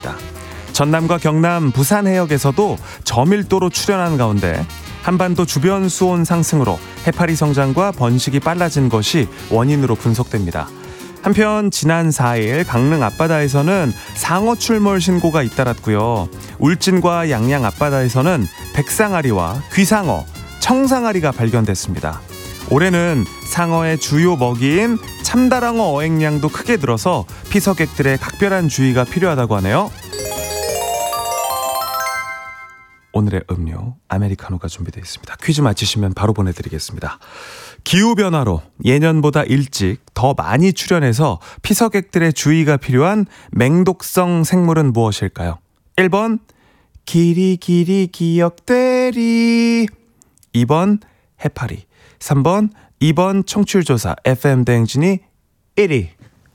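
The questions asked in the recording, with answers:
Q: 기후변화로 예년보다 일찍 더 많이 출현해서 피서객들의 주의가 필요한 맹독성 생물은 무엇일까요?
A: 2: 해파리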